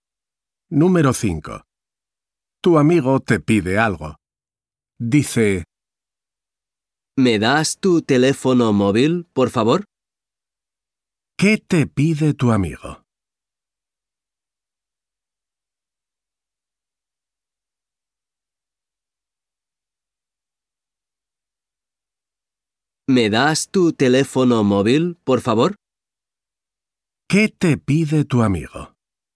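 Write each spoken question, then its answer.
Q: ¿Qué te pide tu amigo?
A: Tu teléfono móvil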